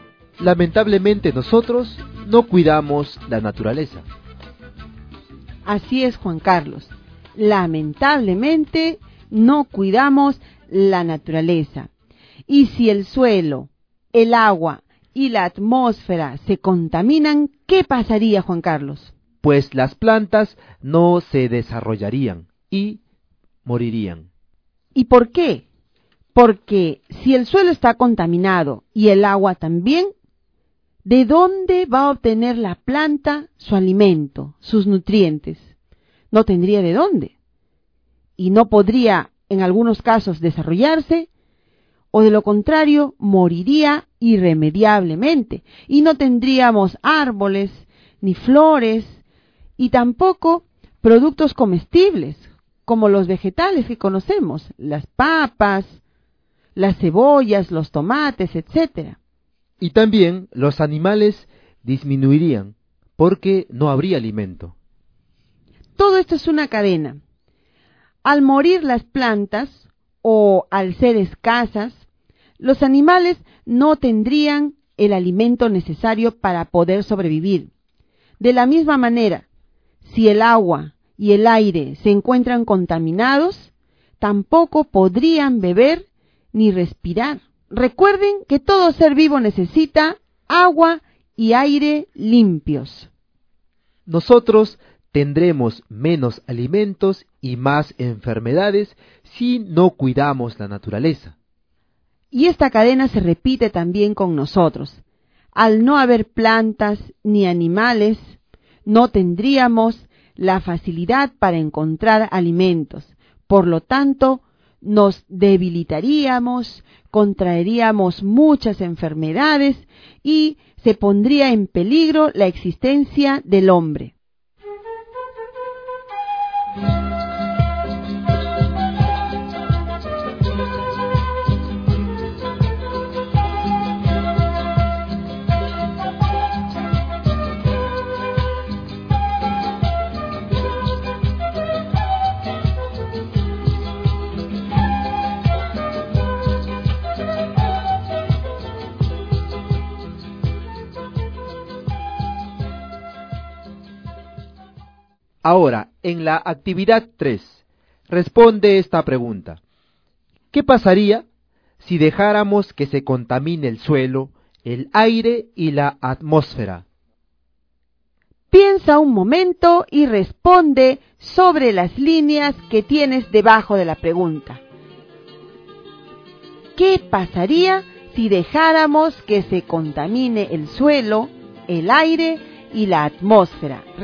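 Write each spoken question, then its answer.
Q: ¿Qué pasaría si dejáramos que se contamine el suelo, el aire y la atmósfera?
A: Las plantas no se desarrollarían y morirían, los animales disminuirían, y nosotros tendríamos menos alimentos y más enfermedades, poniendo en peligro la existencia del hombre.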